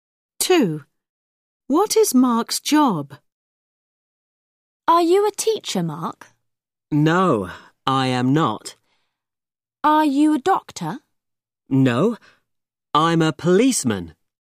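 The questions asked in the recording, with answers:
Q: What is Mark's job?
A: a policeman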